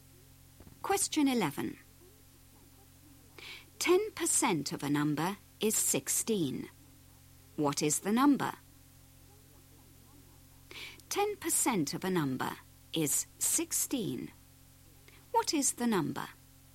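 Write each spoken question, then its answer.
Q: 10% of a number is 16. What is the number?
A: 160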